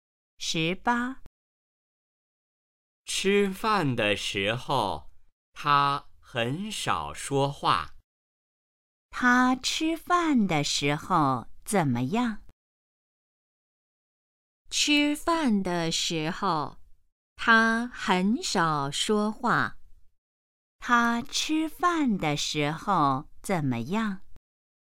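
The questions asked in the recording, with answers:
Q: 他吃饭的时候怎么样?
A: 很少说话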